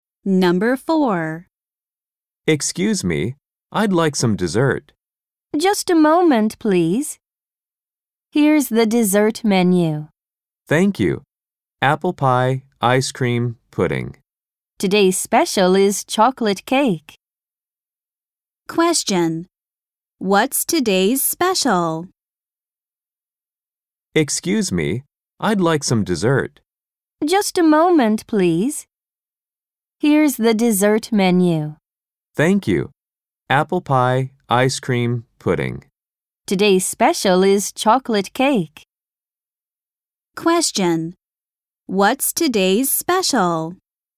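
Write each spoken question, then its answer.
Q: What's today's special?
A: chocolate cake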